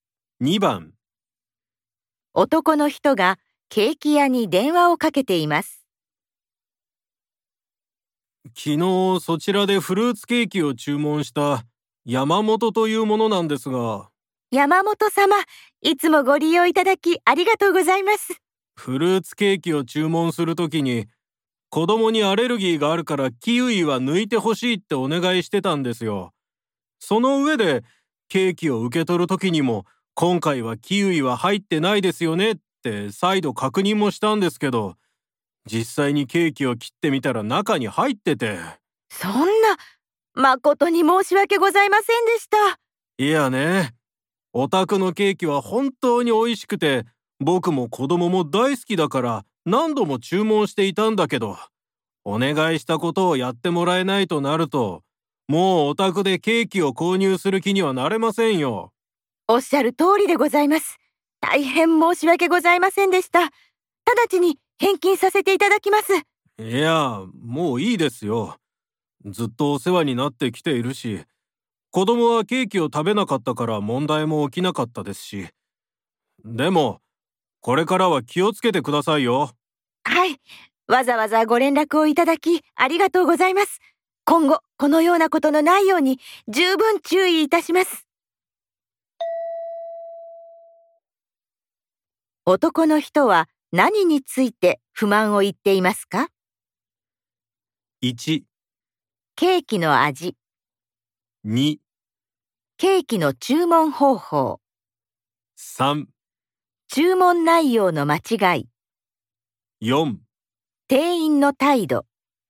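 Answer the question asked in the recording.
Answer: 3: 注文内容の間違い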